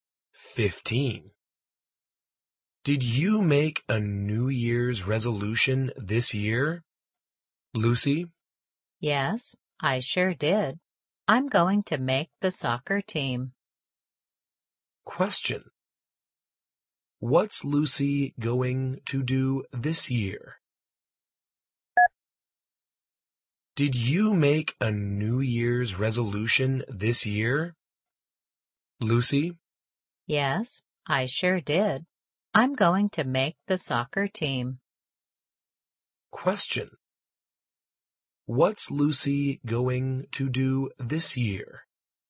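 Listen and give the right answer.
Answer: Make the soccer team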